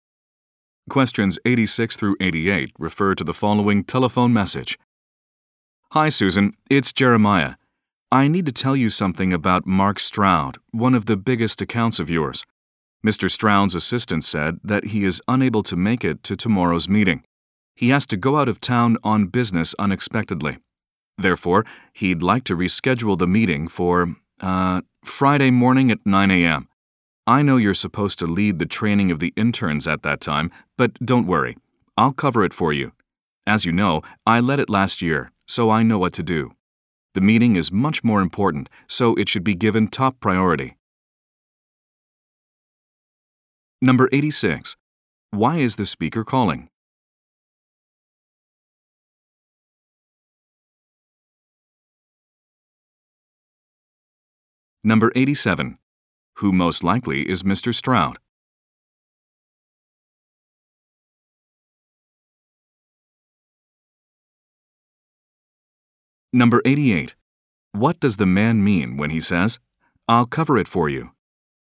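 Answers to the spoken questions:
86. To say Mr. Stroud wants to reschedule the meeting to Friday at 9 a.m.
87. A client (one of Susan's biggest accounts)
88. He will lead the intern training for her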